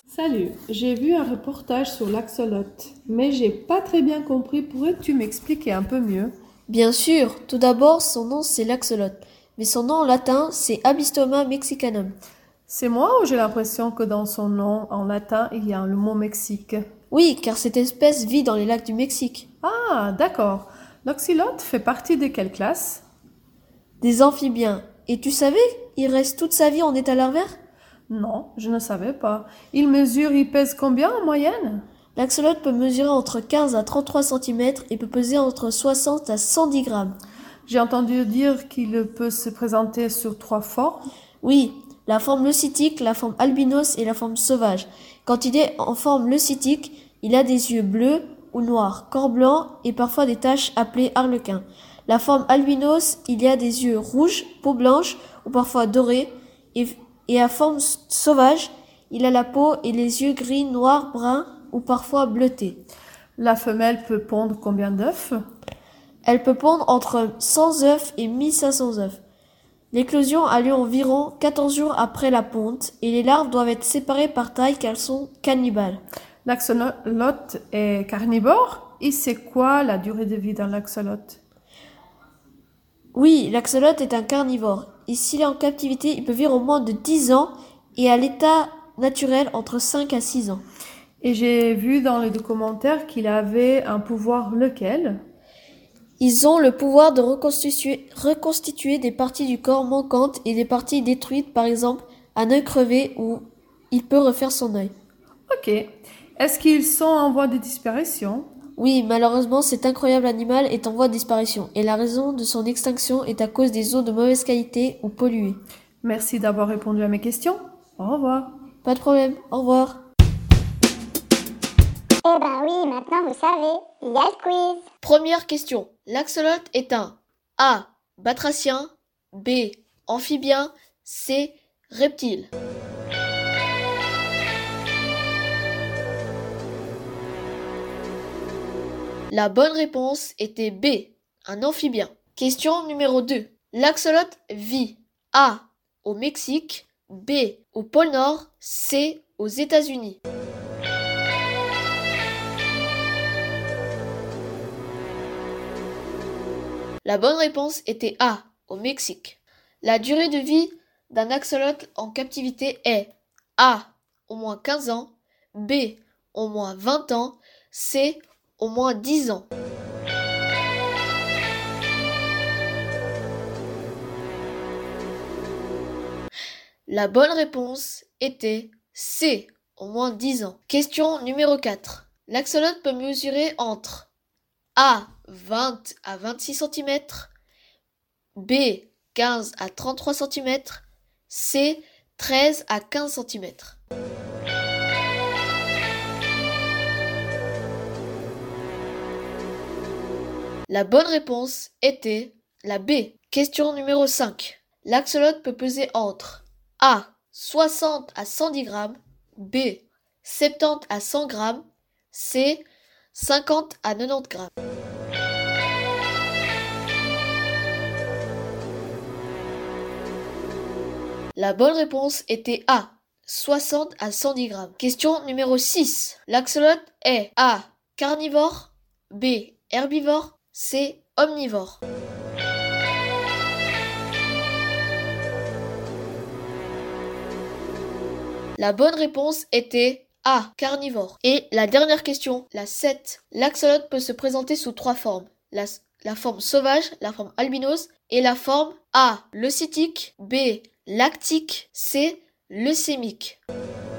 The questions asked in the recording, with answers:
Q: l'axolote est un A.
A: La bonne réponse était B.

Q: l'axolote vit A.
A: La bonne réponse était A, au Mexique.

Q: La durée de vie d'un axolote en captivité est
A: La bonne réponse était C, au moins 10 ans.

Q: L'axolote peut mesurer entre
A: La bonne réponse était la B.

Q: L'axolote peut peser entre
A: La bonne réponse était A, 60 à 110 grammes.

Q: L'axolote est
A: La bonne réponse était A, carnivore.

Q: L'axolote peut se présenter sous trois formes.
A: La bonne réponse était A, leucitique.